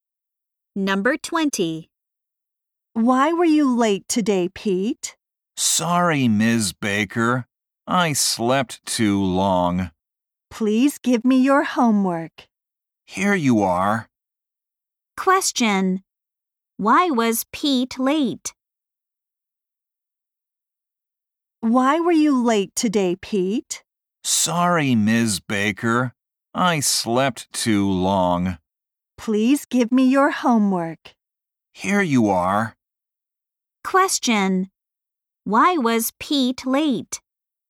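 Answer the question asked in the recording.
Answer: He slept too long.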